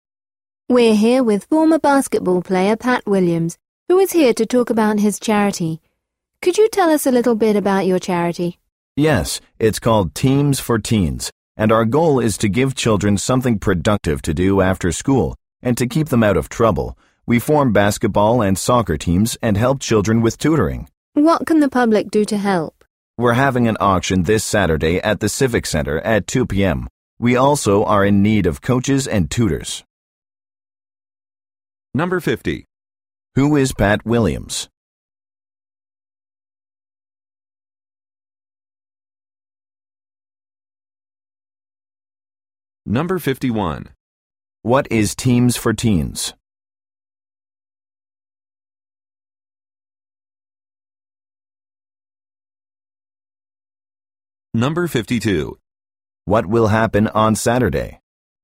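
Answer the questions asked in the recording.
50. A former basketball player
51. A charity that gives children productive after-school activities
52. An auction at the Civic Center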